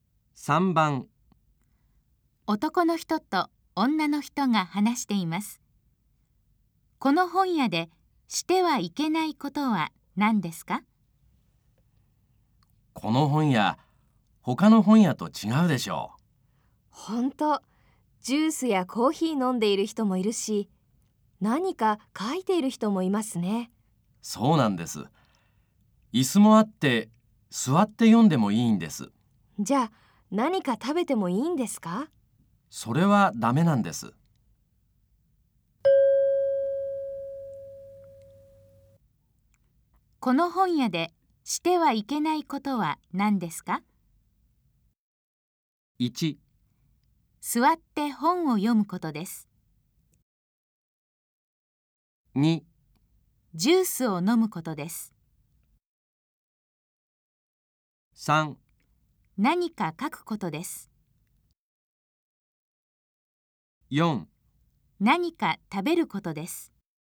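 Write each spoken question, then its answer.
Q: この本屋でしてはいけないことは何ですか?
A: 4: 何か食べることです。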